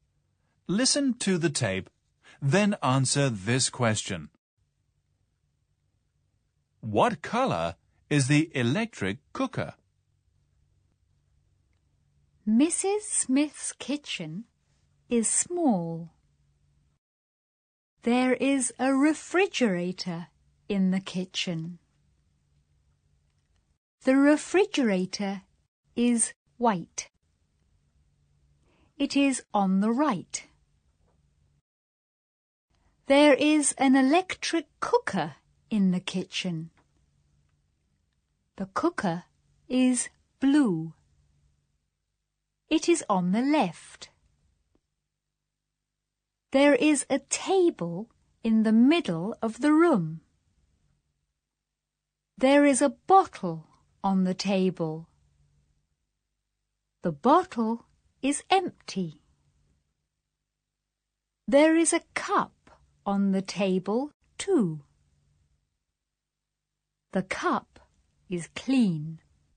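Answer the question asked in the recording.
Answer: Blue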